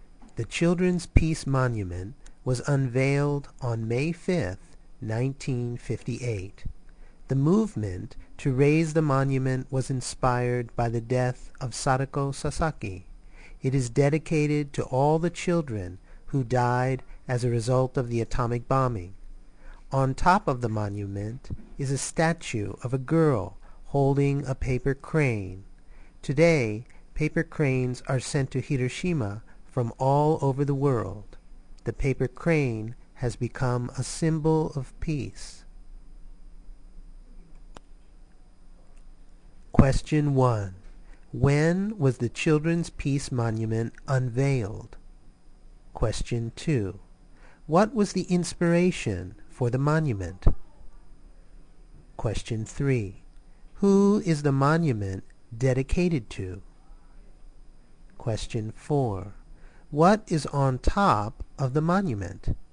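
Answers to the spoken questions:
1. On May 5, 1958
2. The death of Sadako Sasaki
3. All the children who died as a result of the atomic bombing
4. A statue of a girl holding a paper crane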